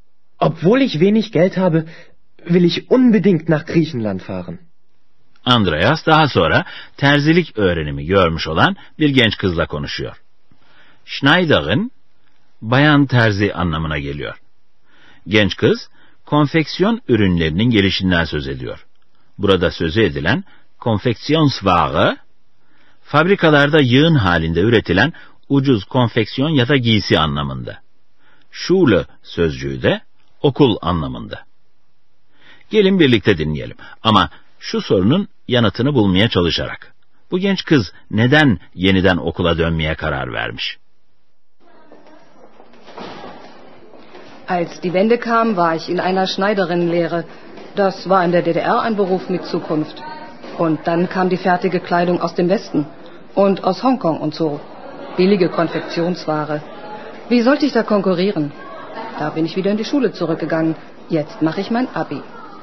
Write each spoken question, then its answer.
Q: Bu genç kız neden yeniden okula dönmeye karar vermiş?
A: Tabi bu ucuz giyim furyasında hiçbir şekilde terzi olarak rekabet edebilmek mümkün değil.